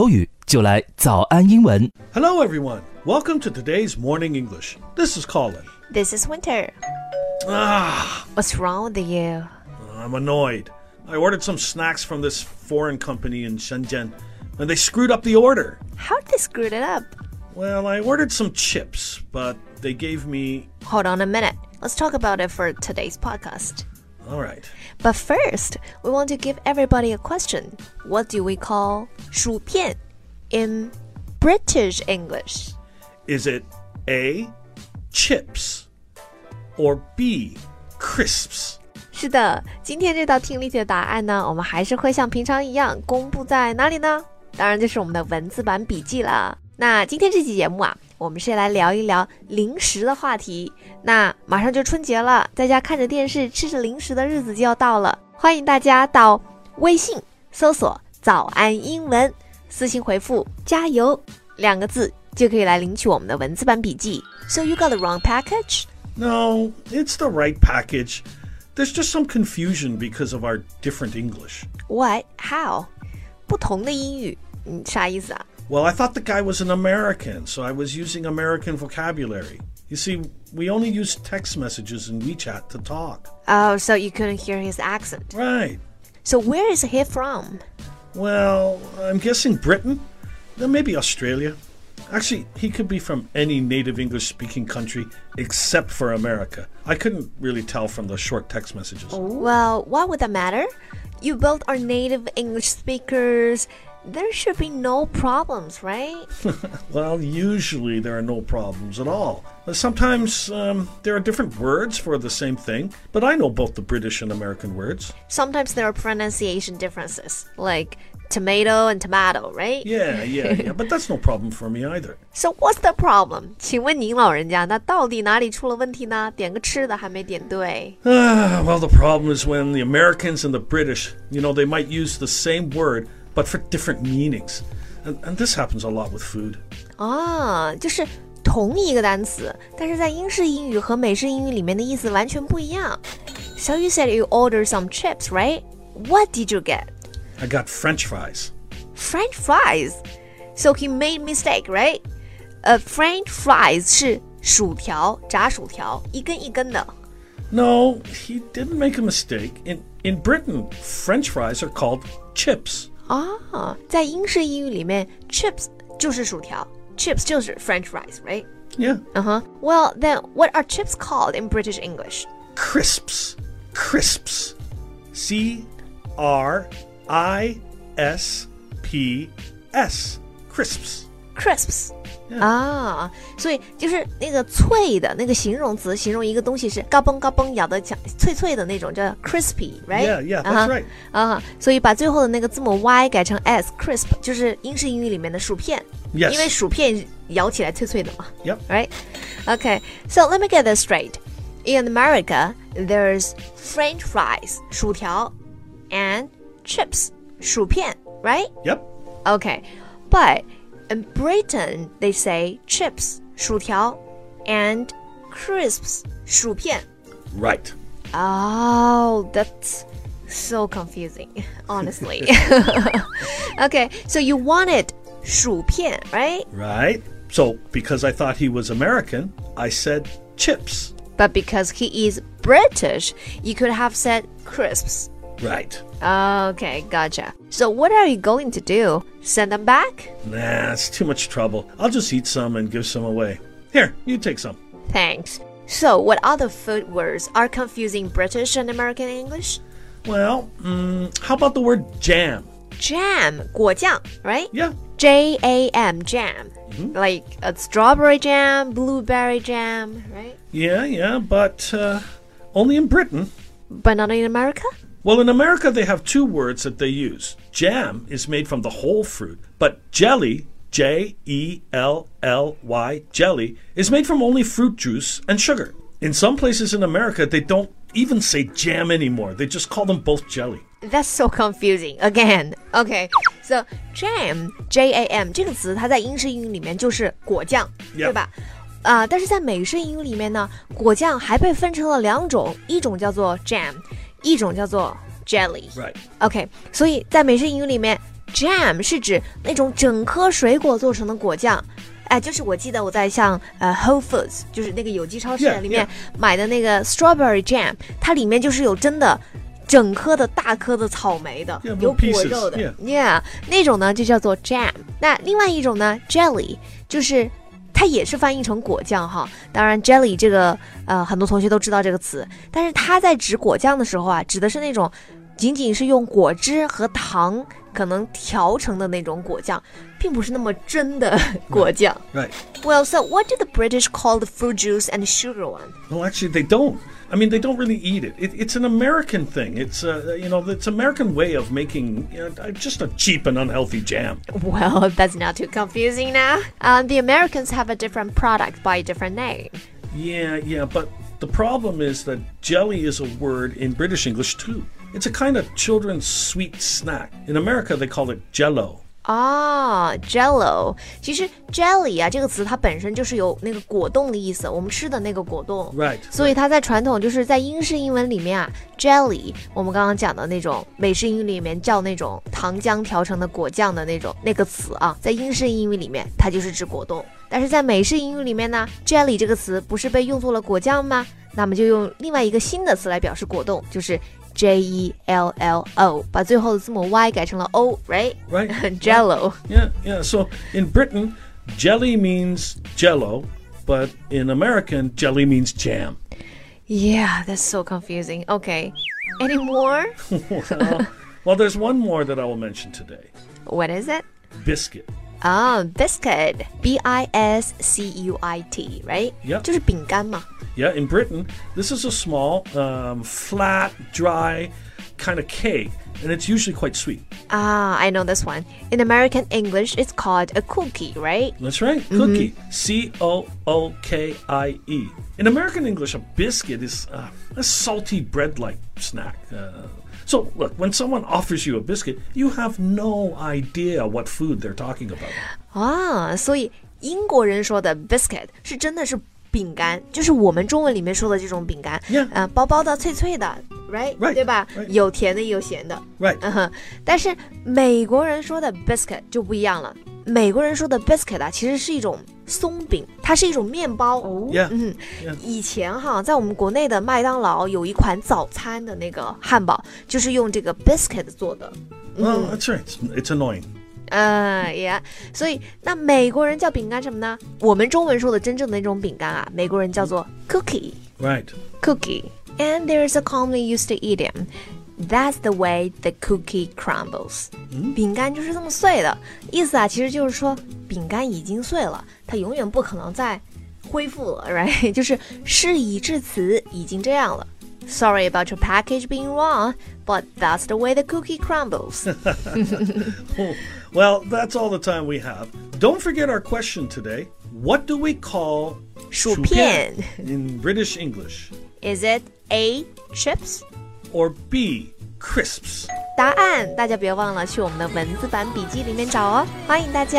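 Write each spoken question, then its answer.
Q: What do we call 薯片 in British English?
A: B: crisps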